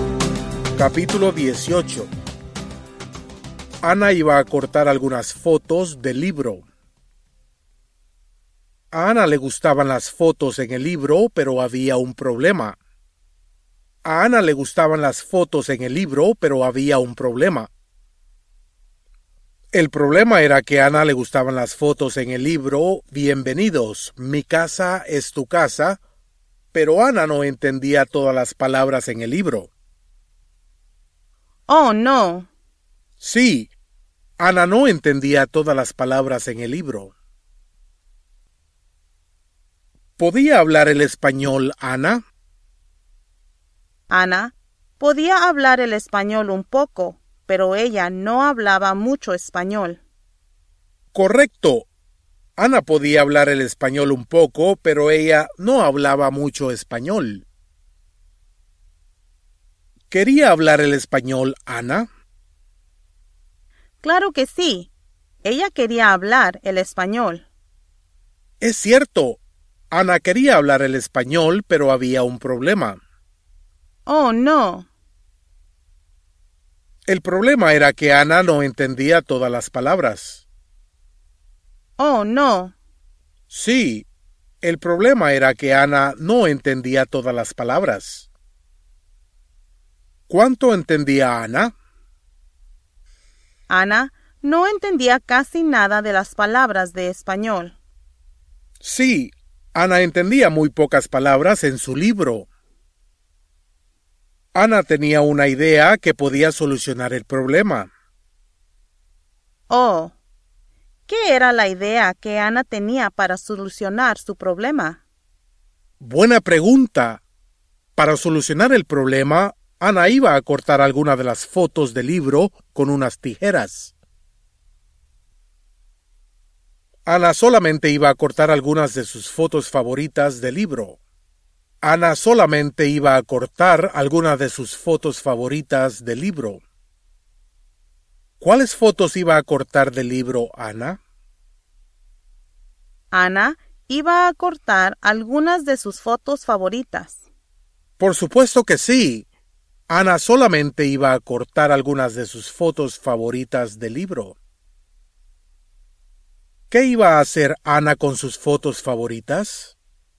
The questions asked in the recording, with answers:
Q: ¿Qué iba a hacer Ana con sus fotos favoritas?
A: Ella iba a cortar algunas de sus fotos favoritas del libro con unas tijeras.